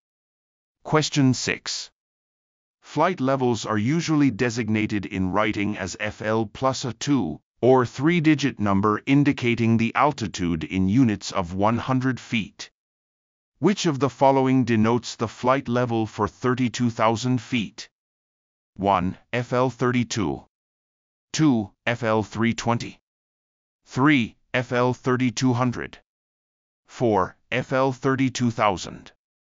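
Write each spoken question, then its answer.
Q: Which of the following denotes the flight level for 32,000 feet?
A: 2: FL320.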